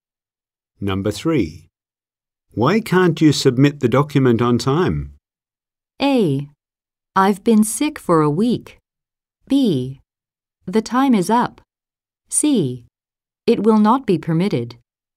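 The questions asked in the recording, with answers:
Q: Why can't you submit the document on time?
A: A: I've been sick for a week.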